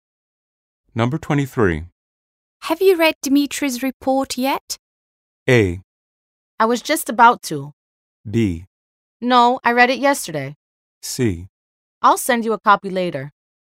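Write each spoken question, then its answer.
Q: Have you read Dimitri's report yet?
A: A: I was just about to.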